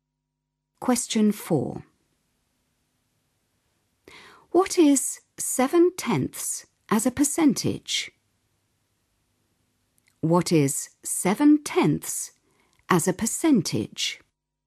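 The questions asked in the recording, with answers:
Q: What is 7/10 as a percentage?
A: 70%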